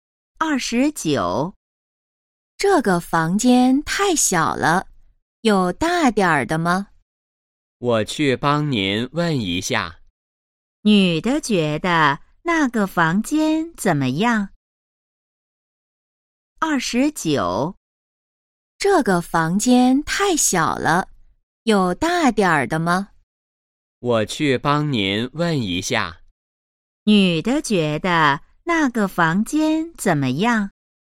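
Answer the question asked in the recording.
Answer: 太小了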